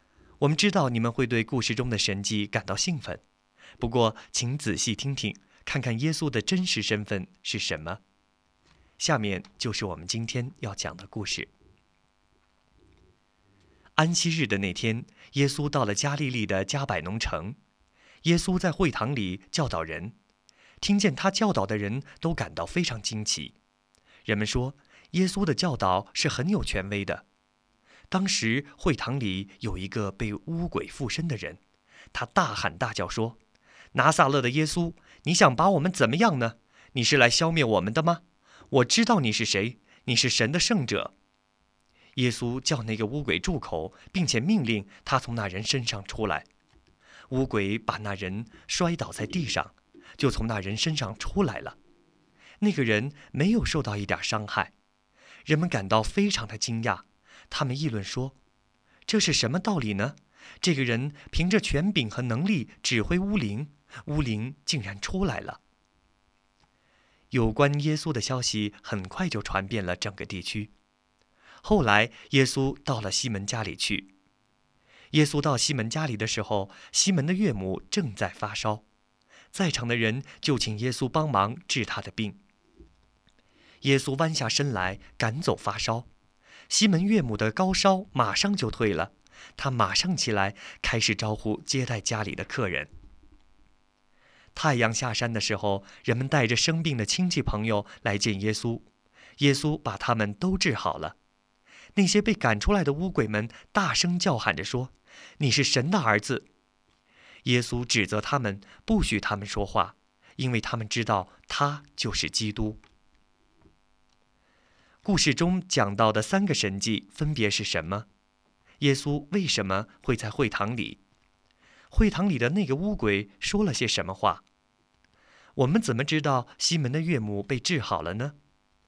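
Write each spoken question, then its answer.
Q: 故事中讲到的三个神迹分别是什么?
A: 赶出会堂里那人身上的污鬼,治好西门岳母的发烧,治好很多病人(并赶出污鬼)

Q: 耶稣为什么会在会堂里?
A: 那天是安息日,他在会堂里教导人

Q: 会堂里的那个污鬼说了些什么话?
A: 拿撒勒的耶稣,你想把我们怎么样呢?你是来消灭我们的吗?我知道你是谁,你是神的圣者。

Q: 我们怎么知道西门的岳母被治好了呢?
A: 她的高烧马上退了,她立刻起来招呼接待家里的客人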